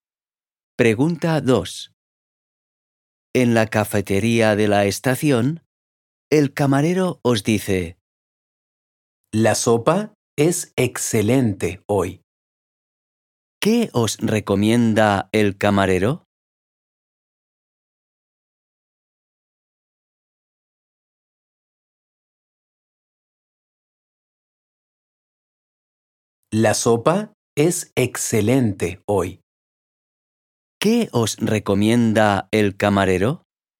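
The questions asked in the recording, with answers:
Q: ¿Qué os recomienda el camarero?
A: La sopa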